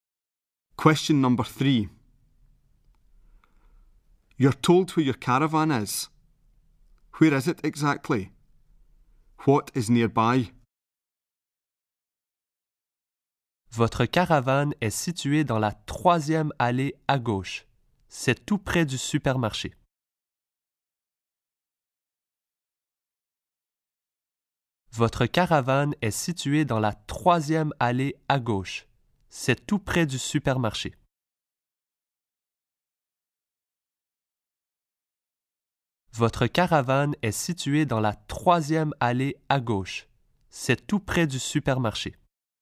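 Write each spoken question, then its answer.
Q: Where is it exactly? What is nearby?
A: Third lane on the left; near the supermarket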